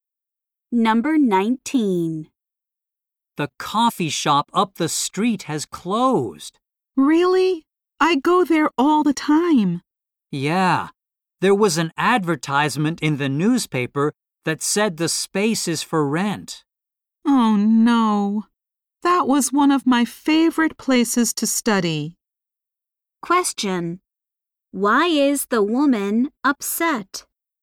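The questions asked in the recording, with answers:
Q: Why is the woman upset?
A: Her favorite coffee shop, where she studied, has closed.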